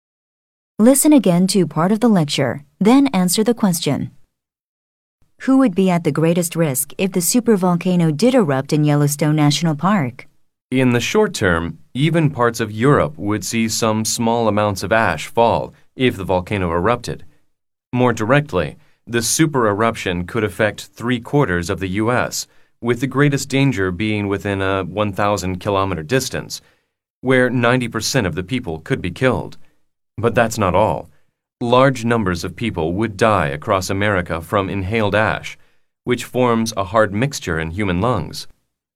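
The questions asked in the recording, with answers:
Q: Who would be at the greatest risk if the supervolcano did erupt in Yellowstone National Park?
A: People living within 1,000 kilometers of the volcano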